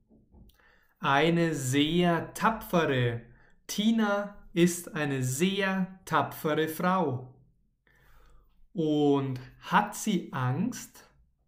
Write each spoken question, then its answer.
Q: Und hat sie Angst?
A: Nein, sie hat vor nichts Angst.